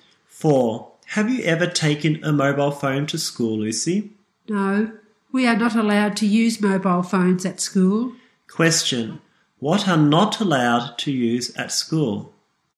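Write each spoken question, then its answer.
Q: What are not allowed to use at school?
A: Mobile phones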